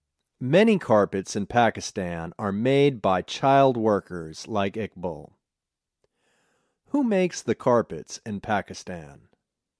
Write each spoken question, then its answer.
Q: Who makes the carpets in Pakistan?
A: They are made by child workers.